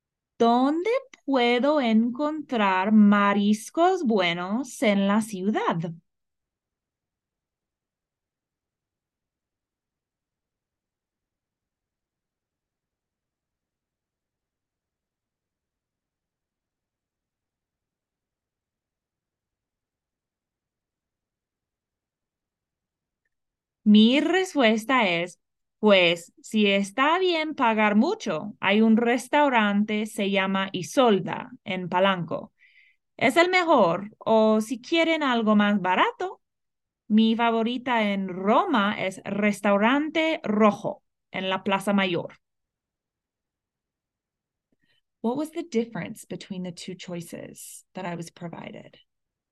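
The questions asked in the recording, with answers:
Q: What was the difference between the two choices that I was provided?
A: Isolda is expensive, but the best; Restaurante Rojo is cheaper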